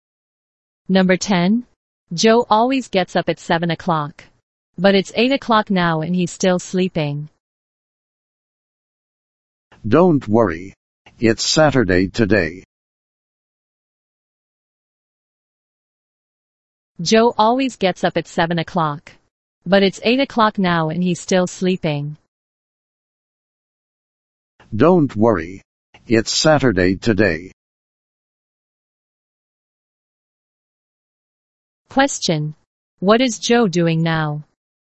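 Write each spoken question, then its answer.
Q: What is Joe doing now?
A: Sleeping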